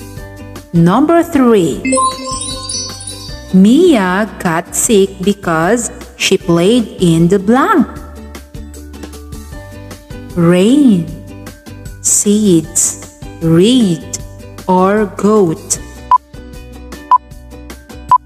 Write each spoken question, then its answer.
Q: Mia got sick because she played in the blank.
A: The answer is rain.